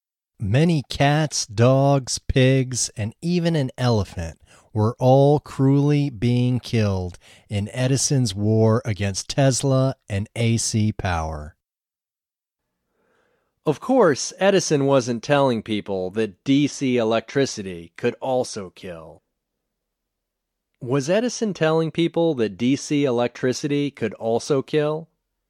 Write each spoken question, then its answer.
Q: Was Edison telling people that DC electricity could also kill?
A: No, Edison wasn't telling people that DC electricity could also kill.